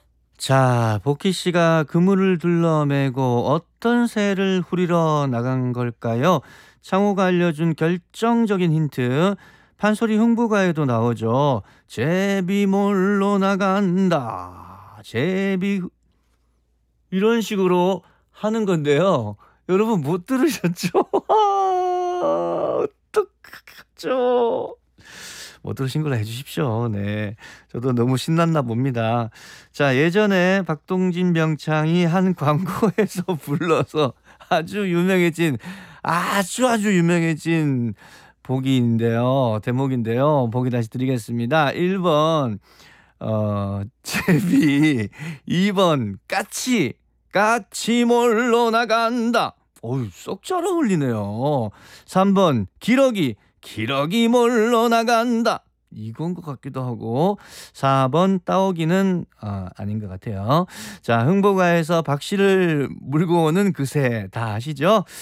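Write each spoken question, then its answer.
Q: 자, 복희 씨가 그물을 둘러매고 어떤 새를 후리러 나간 걸까요?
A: 1번: 제비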